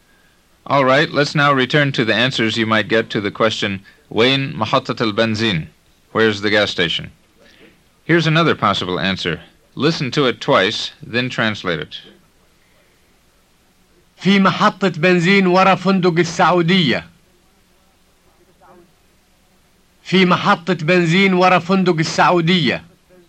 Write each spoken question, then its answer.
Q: Listen to it twice, then translate it.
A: It means there's a gas station behind Hotel Saudia.